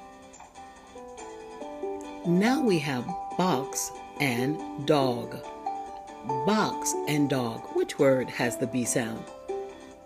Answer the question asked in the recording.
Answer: Excellent. The word box has the B sound.